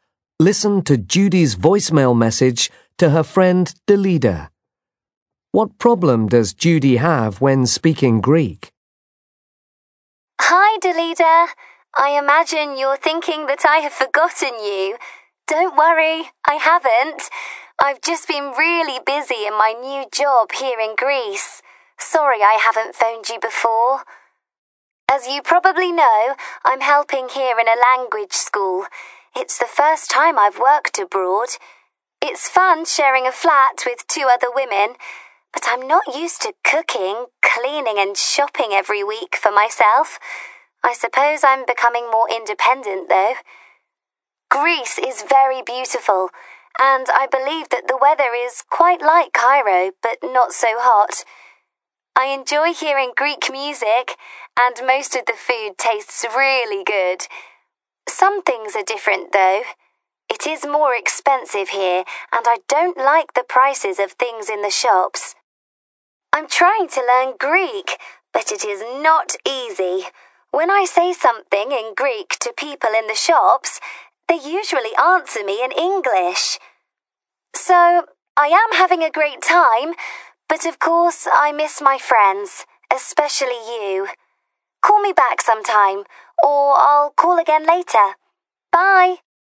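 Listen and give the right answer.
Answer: People in shops usually answer her in English.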